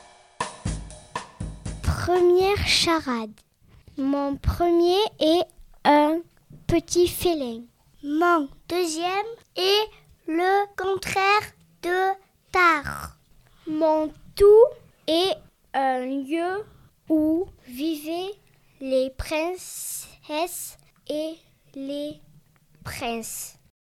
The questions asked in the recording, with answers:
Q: Mon tout est un lieu où vivaient les princesses et les princes.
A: Je suis un château.